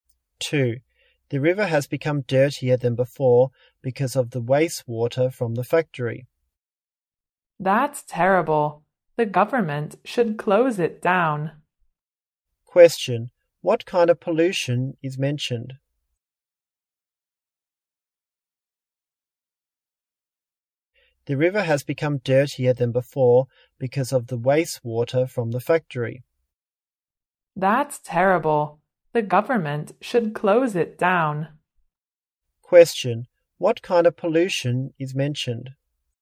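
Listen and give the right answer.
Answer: Water pollution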